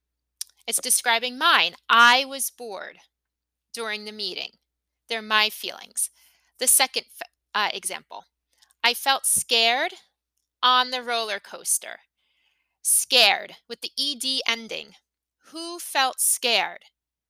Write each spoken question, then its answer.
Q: Who felt scared?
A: That's right, I did.